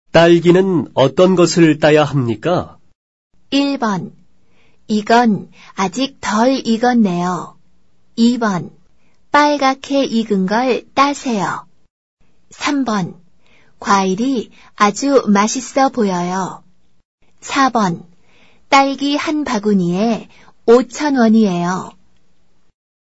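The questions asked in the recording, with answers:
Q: 딸기는 어떤 것을 따야 합니까?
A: 2번: 빨갛게 익은 걸 따세요.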